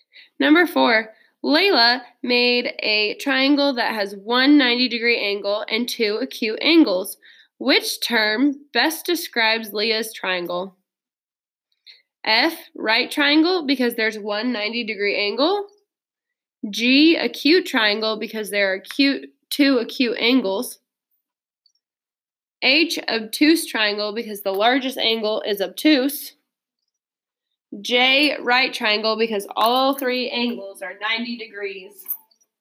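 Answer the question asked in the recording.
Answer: F: right triangle, because there's one 90 degree angle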